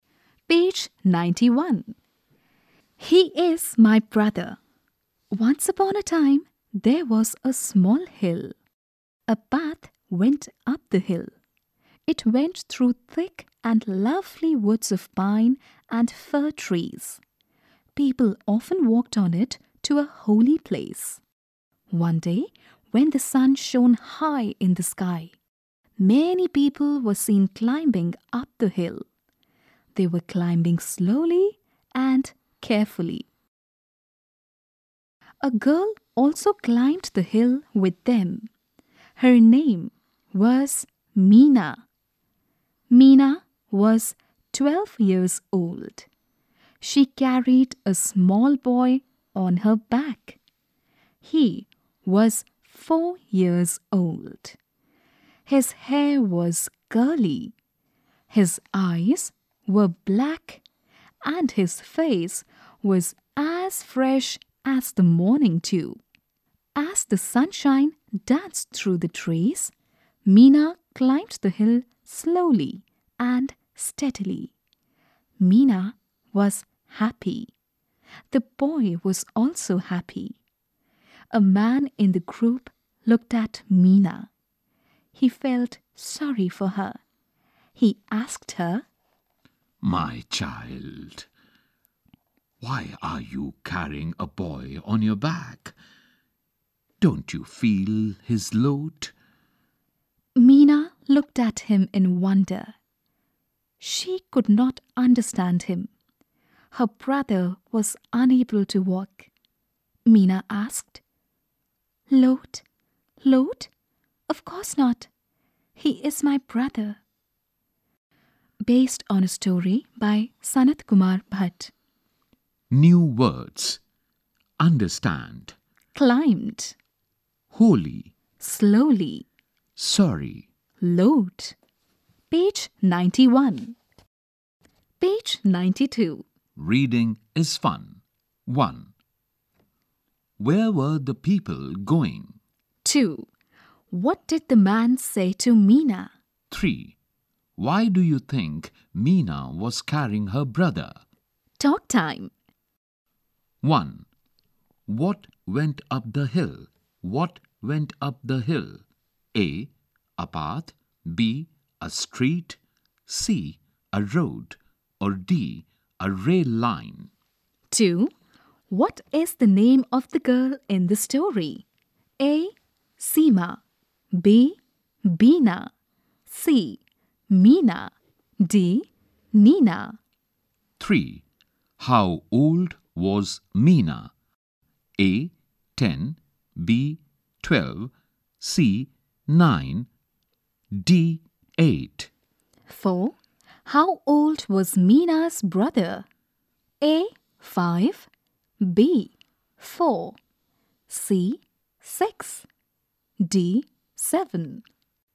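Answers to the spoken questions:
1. A: A path
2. C: Meena
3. B: 12
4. B: 4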